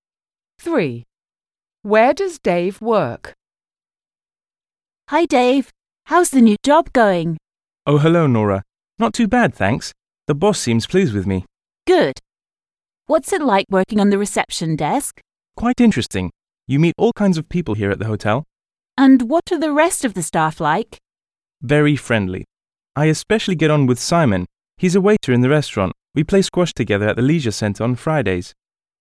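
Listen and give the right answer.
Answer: at a hotel (reception desk)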